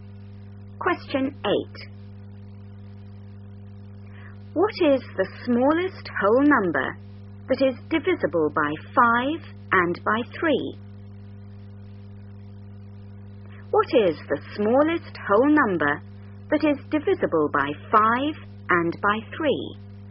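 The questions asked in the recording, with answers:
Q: What is the smallest whole number that is divisible by 5 and by 3?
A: 15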